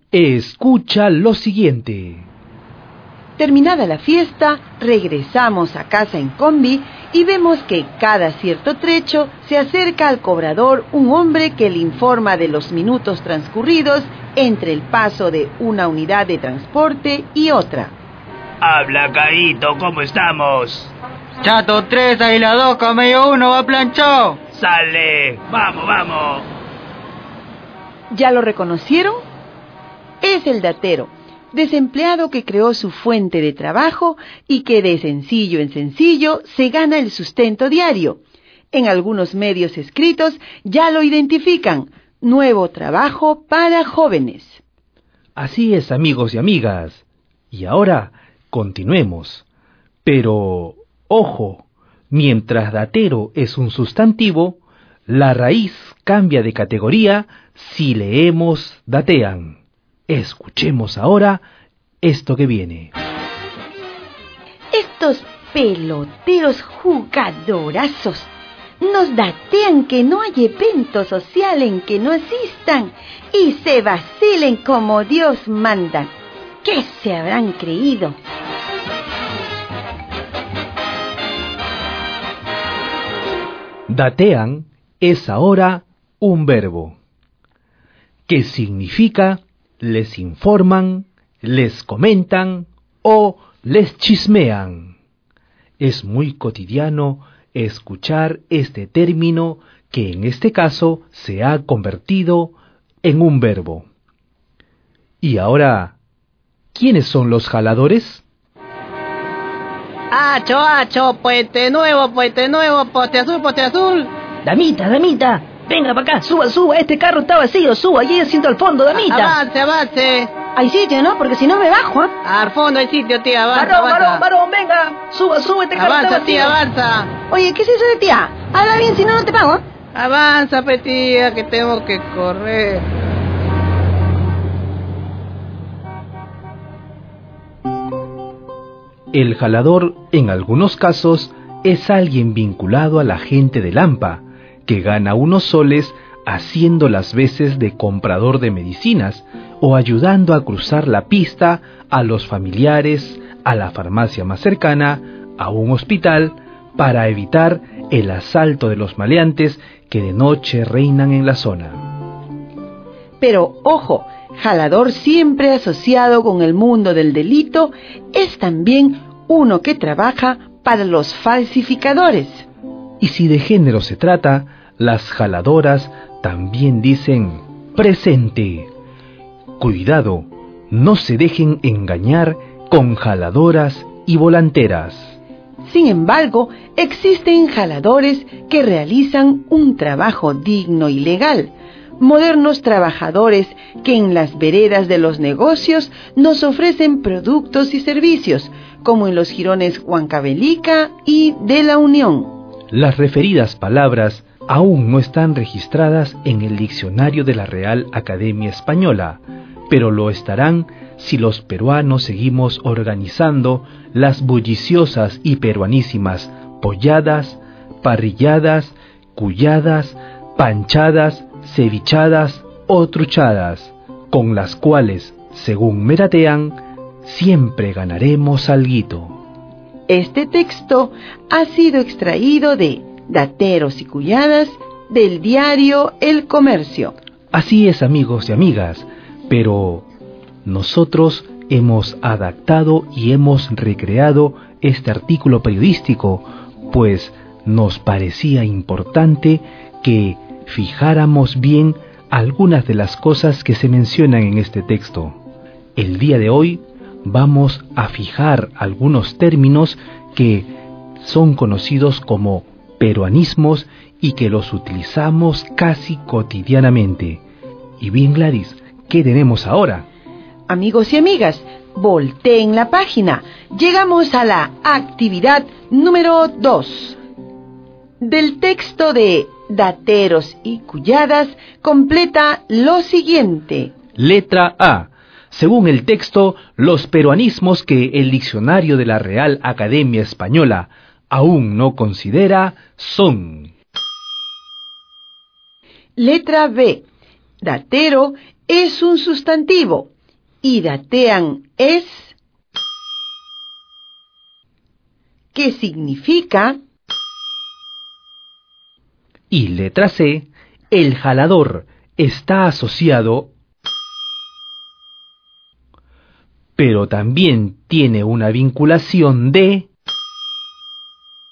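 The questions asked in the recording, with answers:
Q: Datero es un sustantivo y datean es...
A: un verbo; significa les informan, les comentan o les chismean

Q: El jalador está asociado... pero también tiene una vinculación de...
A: al mundo del delito; pero también con un trabajo digno y legal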